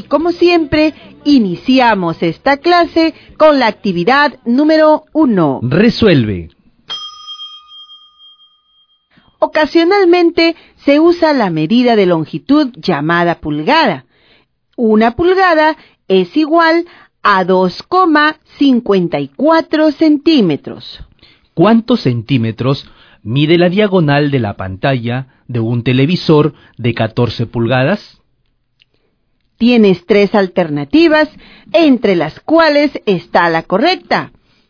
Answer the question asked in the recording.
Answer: 35,56 centímetros.